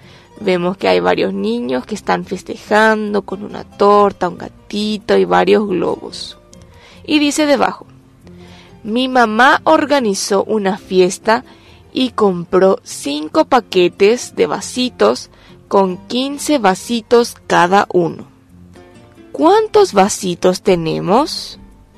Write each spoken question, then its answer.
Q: ¿Cuántos vasitos tenemos?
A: En total tenemos 75 vasitos.